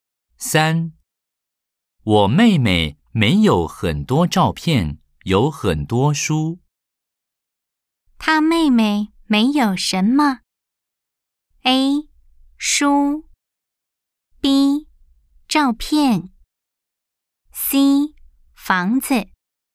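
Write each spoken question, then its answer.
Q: 她妹妹没有什么?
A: B: 照片。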